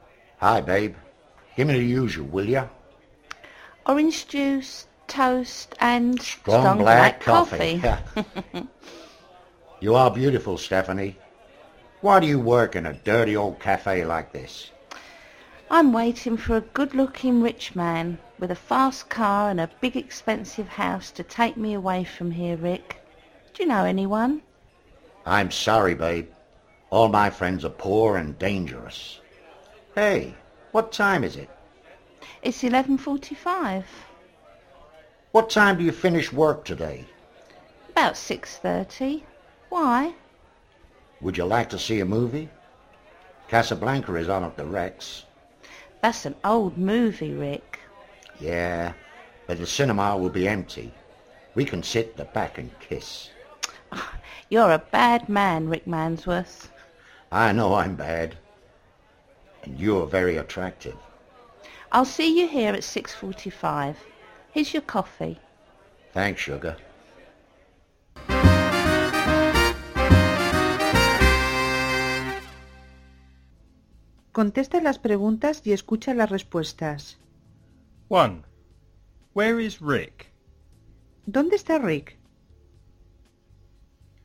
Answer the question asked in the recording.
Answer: He's in a cafe.